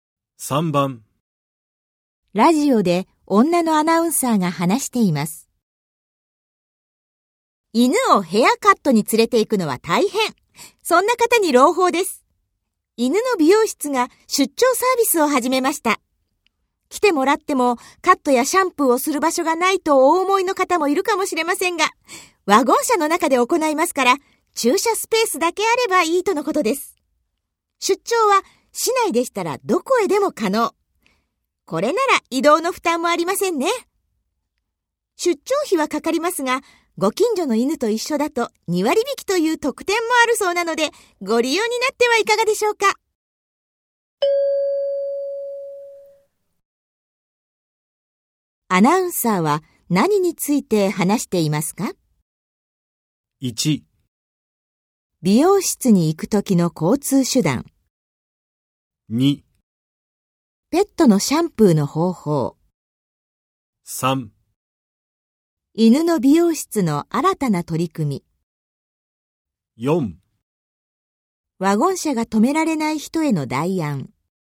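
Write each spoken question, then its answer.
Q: アナウンサーは何について話していますか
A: 3: 犬の美容室の新たな取り組み。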